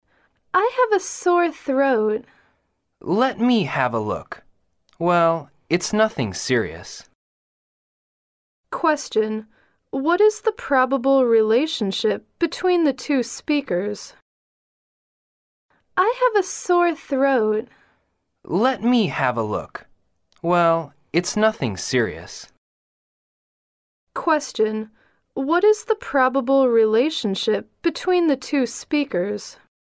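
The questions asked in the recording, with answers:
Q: what is the probable relationship between the two speakers?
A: Doctor and patient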